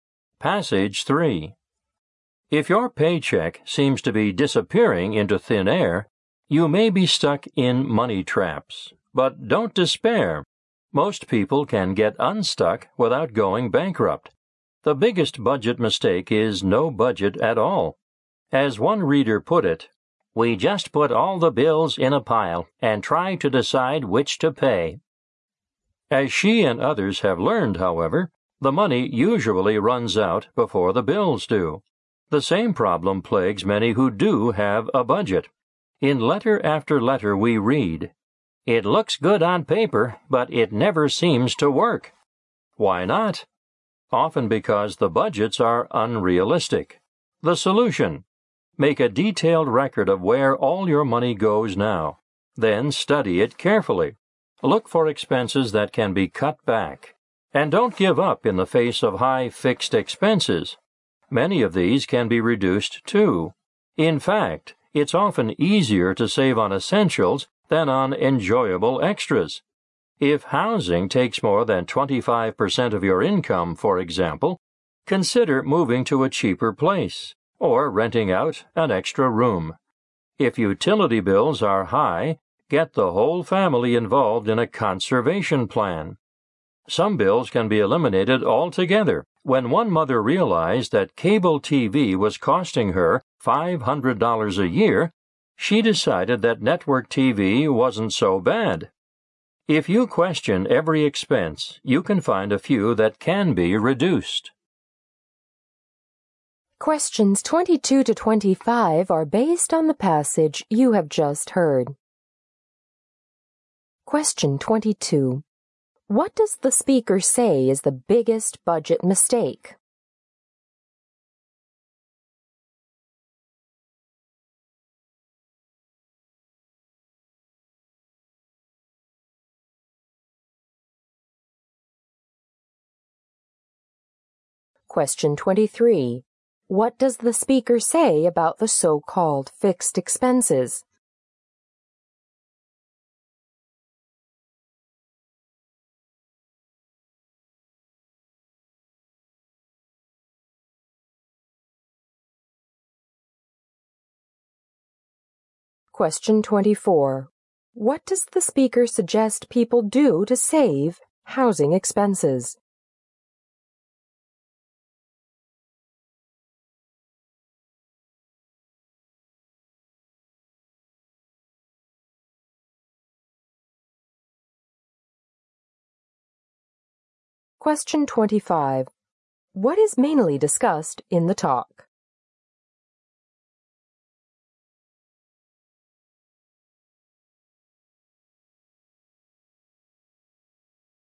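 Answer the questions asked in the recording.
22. Having no budget at all.
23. Many of them can be reduced too.
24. Move to a cheaper place or rent out an extra room.
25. How to get out of money traps by budgeting and cutting expenses.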